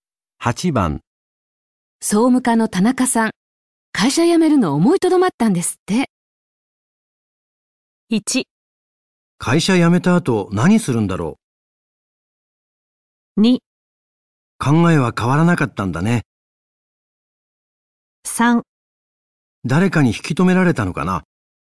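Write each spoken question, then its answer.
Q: 総務課の田中さん、会社辞めるの思いとどまったんですって。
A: 3: 誰かに引き止められたのかな。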